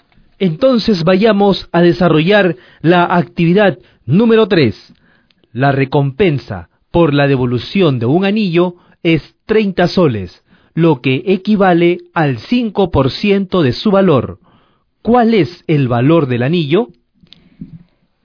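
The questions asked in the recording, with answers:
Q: ¿Cuál es el valor del anillo?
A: 600 soles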